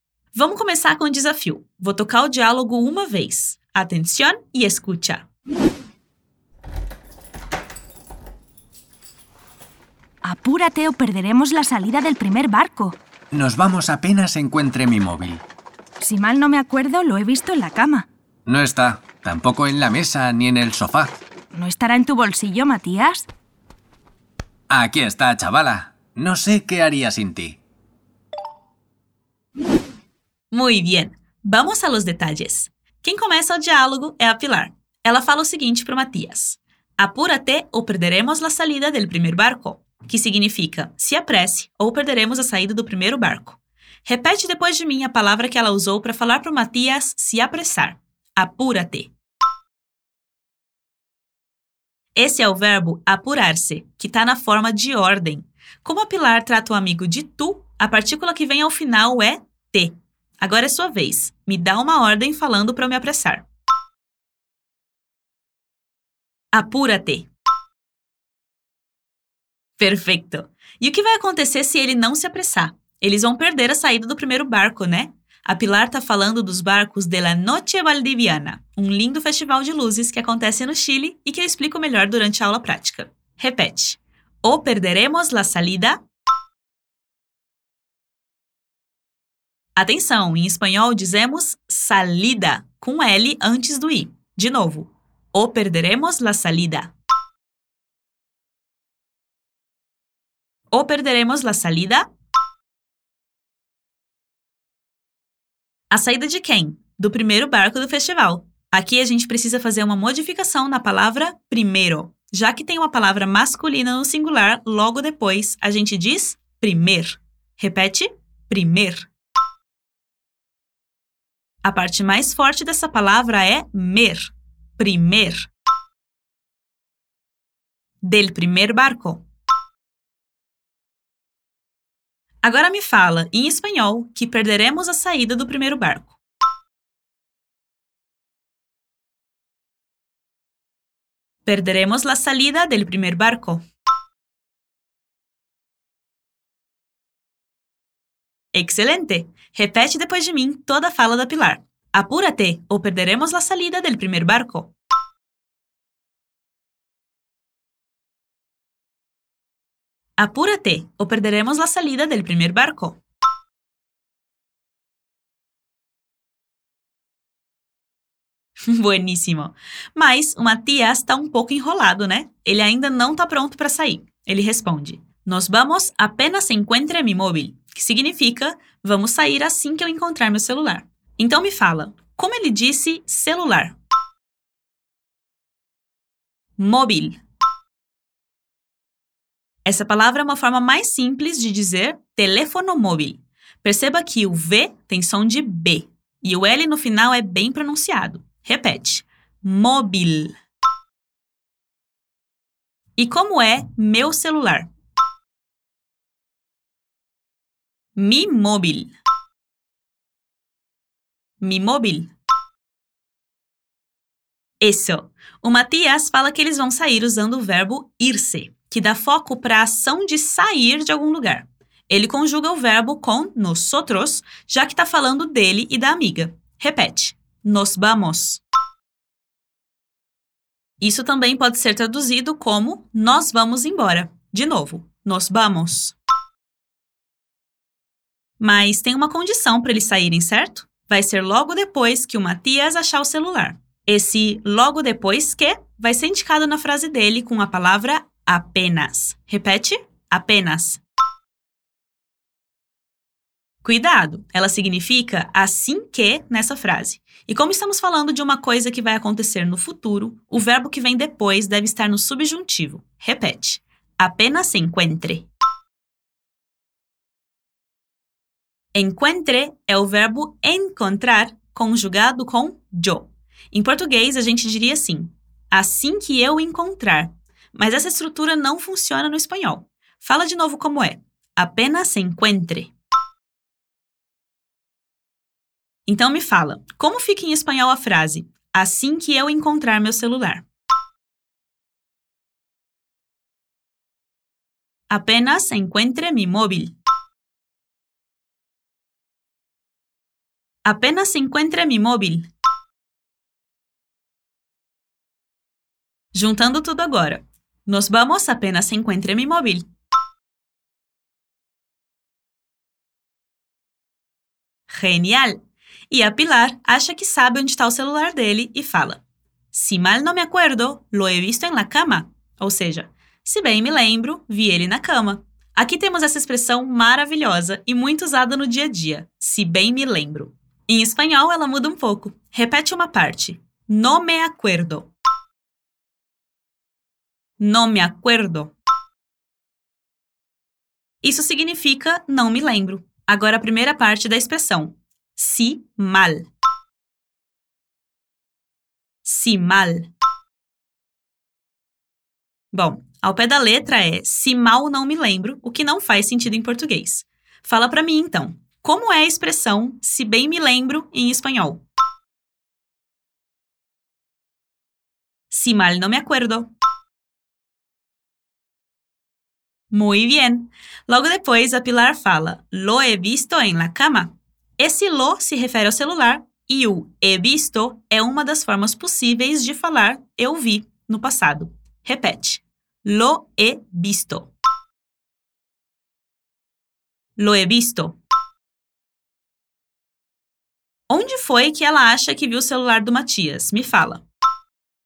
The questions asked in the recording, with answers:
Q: Onde foi que ela acha que viu o celular do Matias?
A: En la cama.